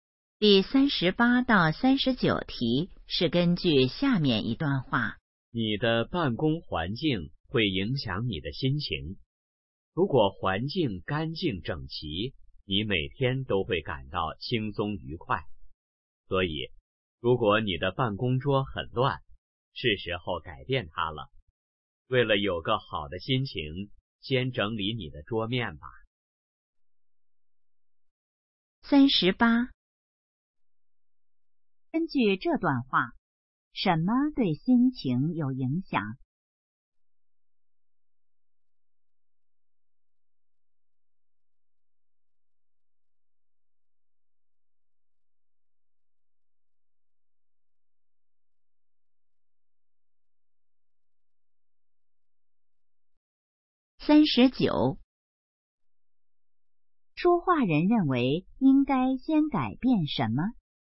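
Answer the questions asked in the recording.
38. 办公环境
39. 桌面(整理办公桌)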